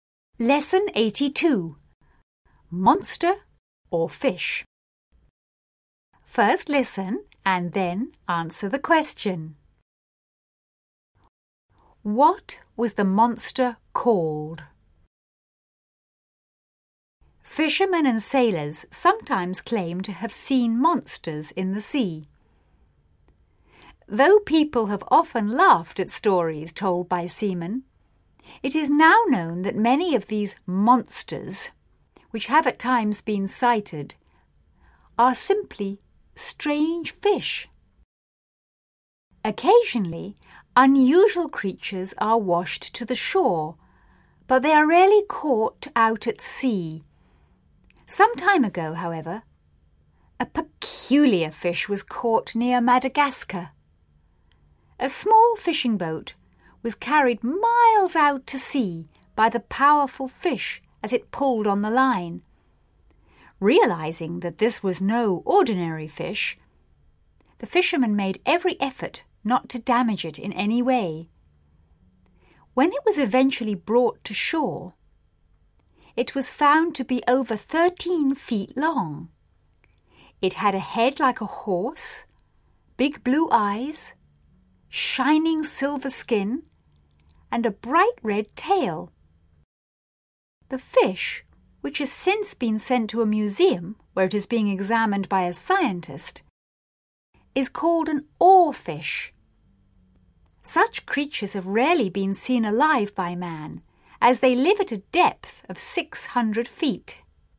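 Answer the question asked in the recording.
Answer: An oarfish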